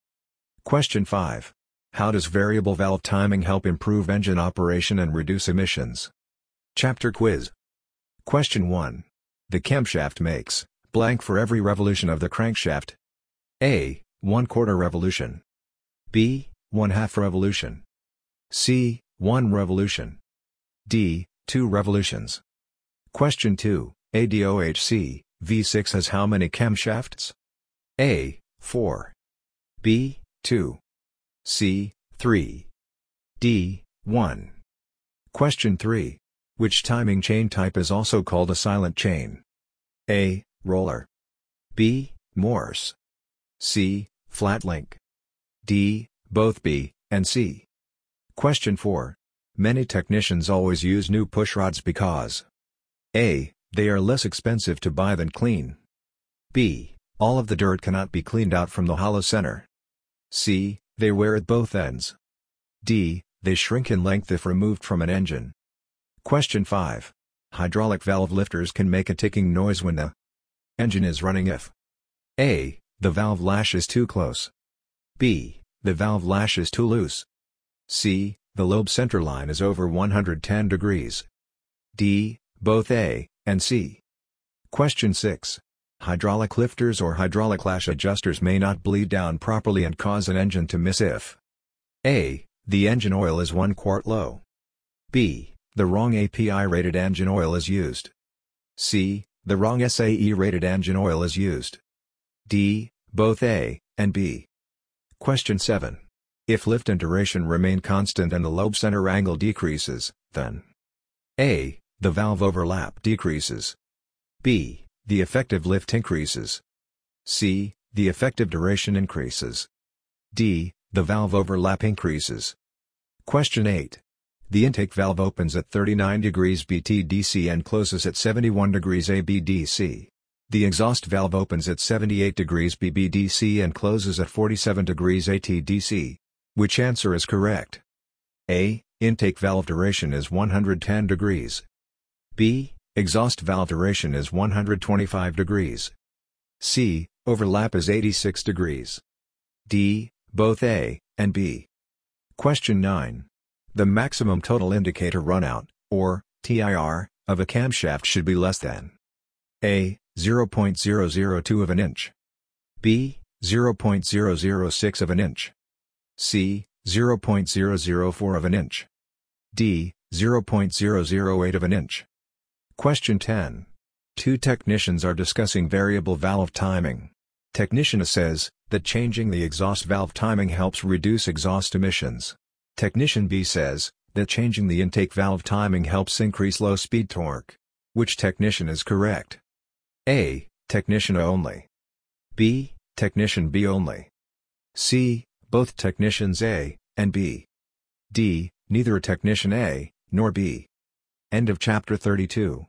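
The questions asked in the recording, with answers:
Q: Which answer is correct? A.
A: C: Overlap is 86 degrees.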